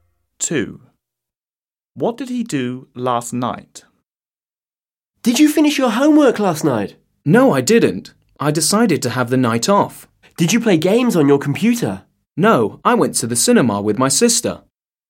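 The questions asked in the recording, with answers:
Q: What did he do last night?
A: went to the cinema with his sister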